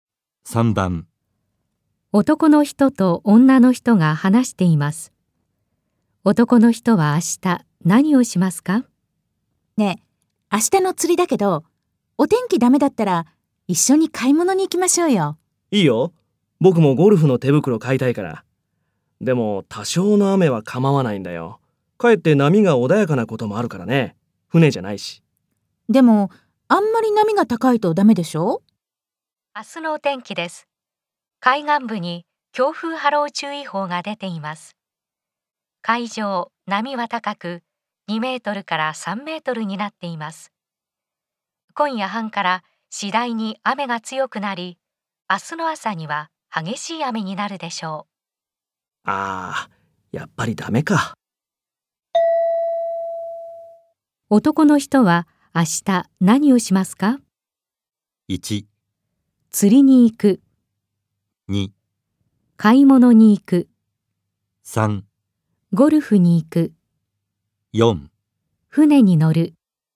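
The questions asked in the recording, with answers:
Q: 男の人は明日何をしますか?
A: 2: 買い物に行く。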